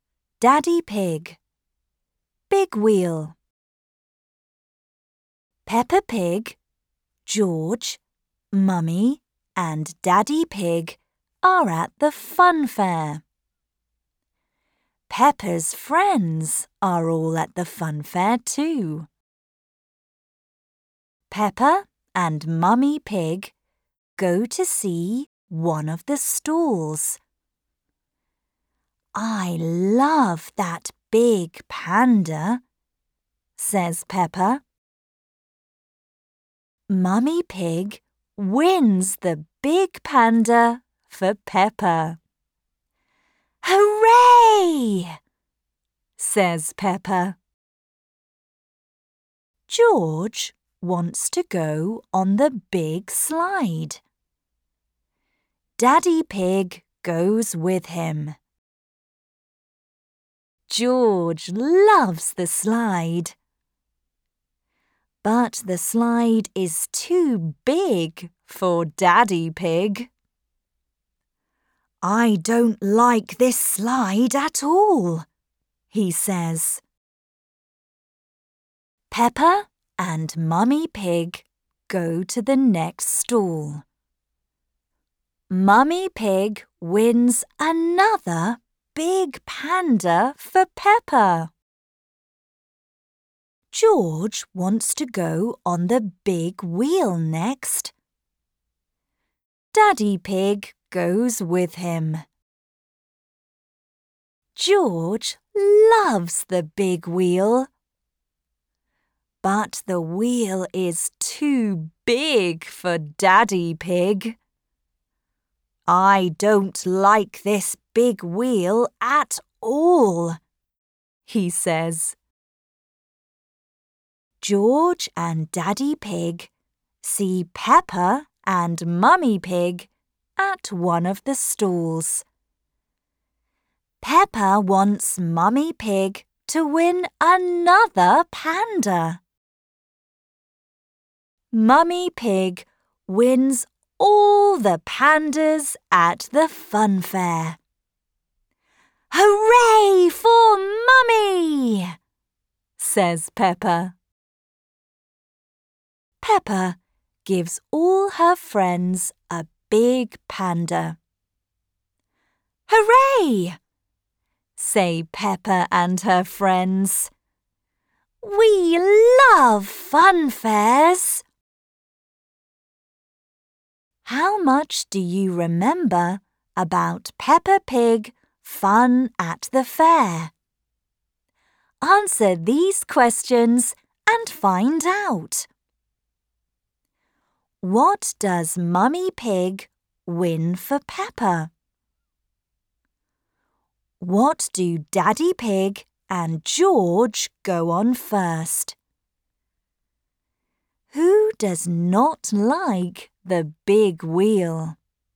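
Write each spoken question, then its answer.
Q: What does Mummy Pig win for Peppa?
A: A big panda

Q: What do Daddy Pig and George go on first?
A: The big slide

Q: Who does not like the big wheel?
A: Daddy Pig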